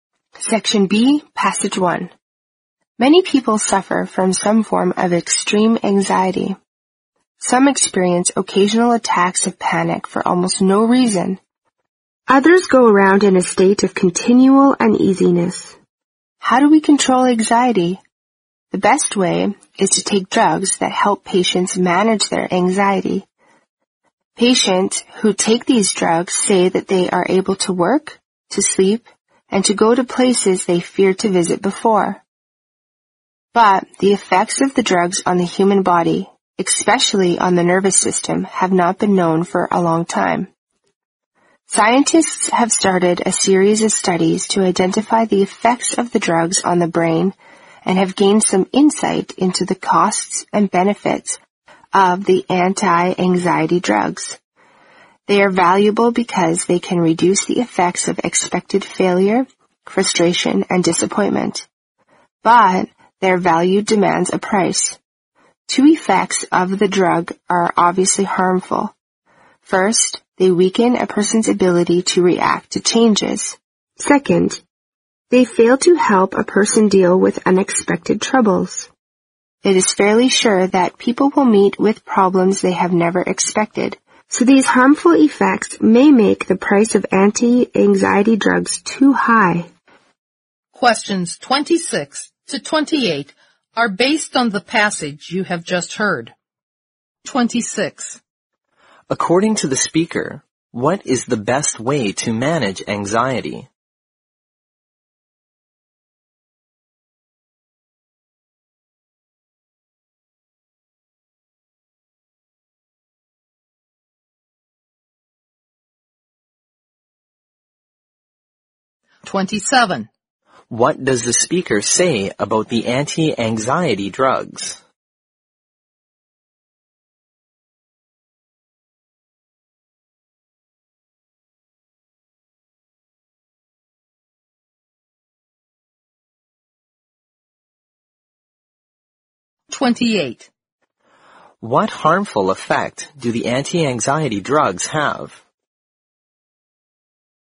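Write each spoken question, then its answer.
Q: According to the speaker, what is the best way to manage anxiety?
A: Taking drugs that help patients manage their anxiety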